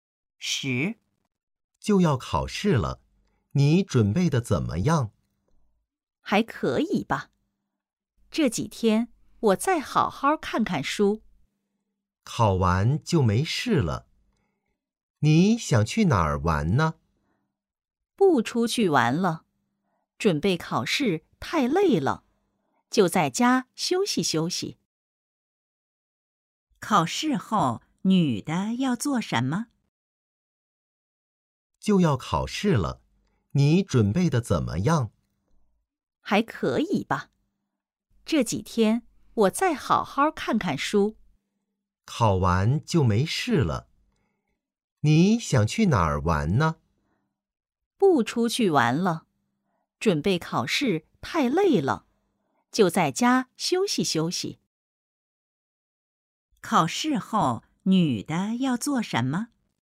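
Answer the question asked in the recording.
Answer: 在家休息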